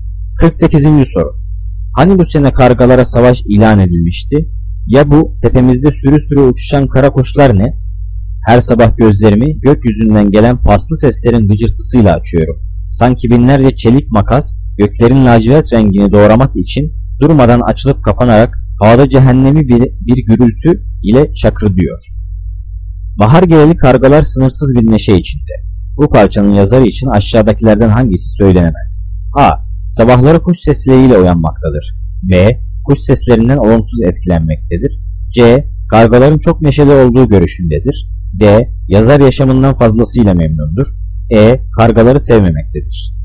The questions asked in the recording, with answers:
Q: Bu parçanın yazarı için aşağıdakilerden hangisi söylenemez?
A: Cevap D. Yazar yaşamından fazlasıyla memnundur.